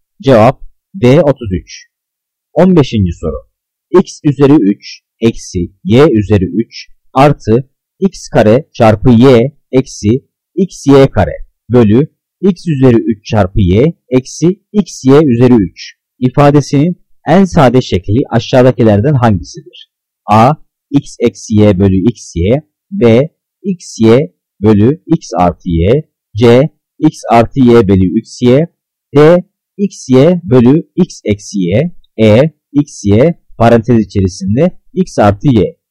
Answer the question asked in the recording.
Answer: Cevap C. X artı y bölü x y.